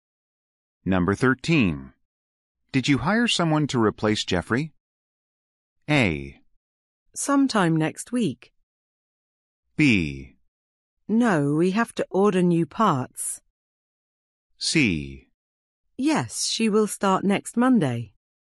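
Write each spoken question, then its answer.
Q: Did you hire someone to replace Jeffrey?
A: C: Yes, she will start next Monday.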